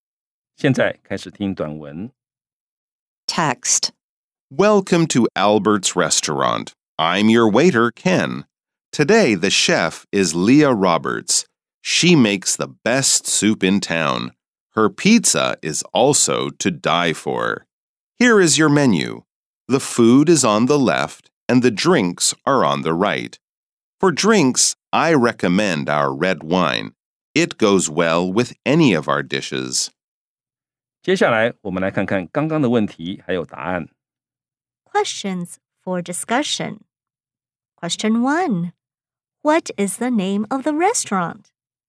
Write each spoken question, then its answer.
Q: What is the name of the restaurant?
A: The name of the restaurant is Albert's Restaurant.